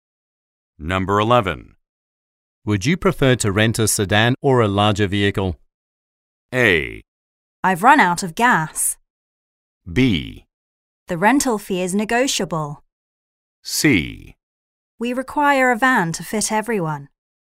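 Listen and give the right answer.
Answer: C: We require a van to fit everyone.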